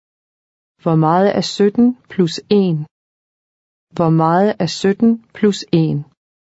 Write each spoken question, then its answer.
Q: Hvor meget er 17 plus 1?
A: 18. 18.